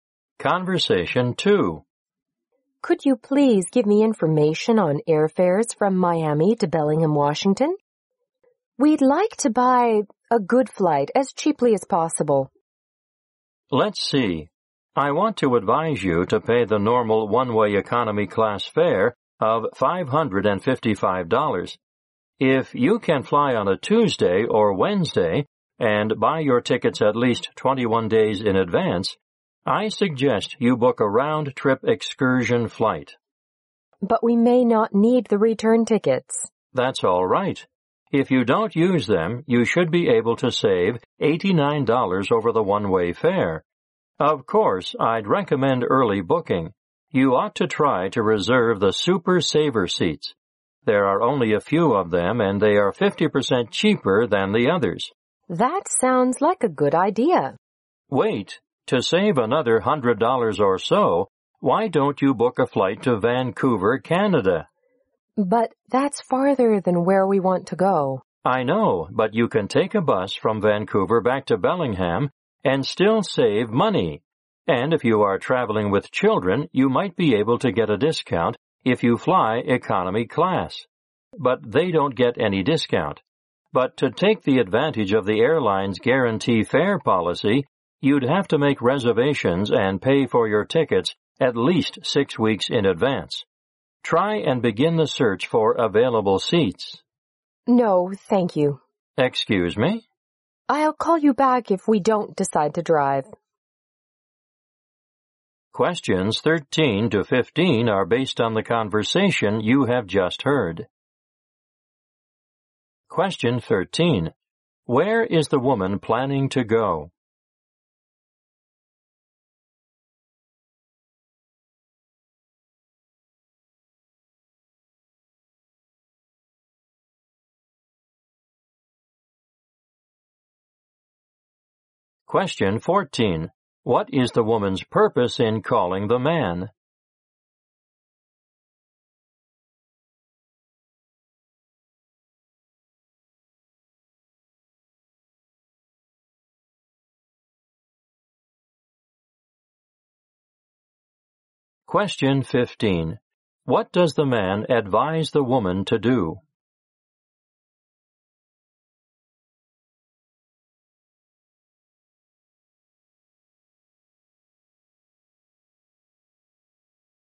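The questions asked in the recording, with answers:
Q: Where is the woman planning to go?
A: Bellingham, Washington.

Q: What is the woman's purpose in calling the man?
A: To get information on airfares and find a cheap flight.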